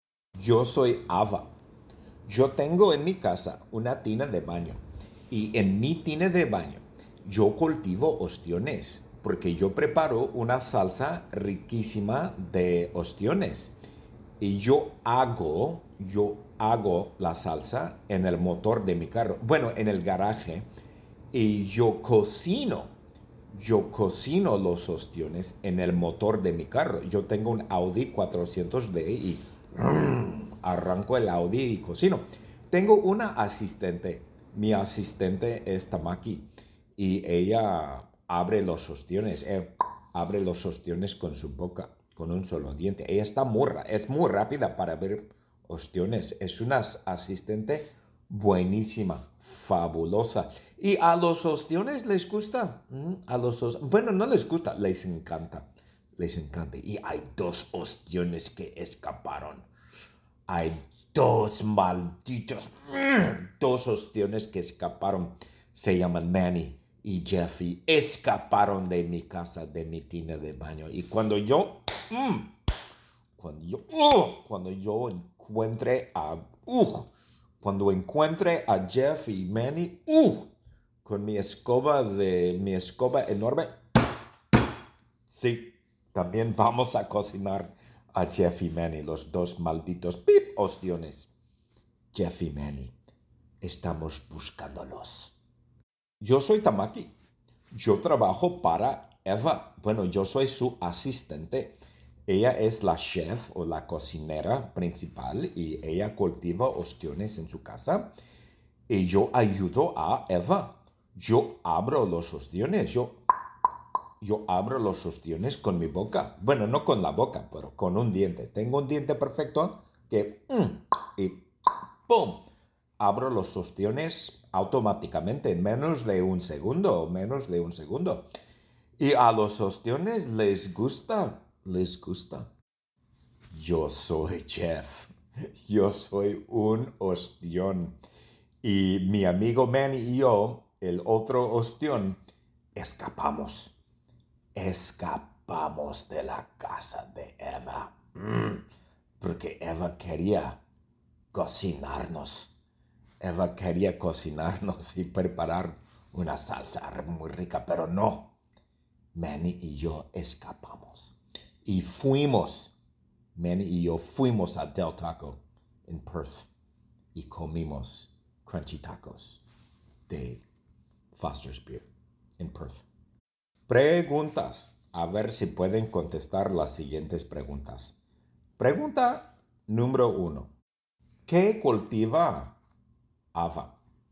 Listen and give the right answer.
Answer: Ava cultiva ostiones.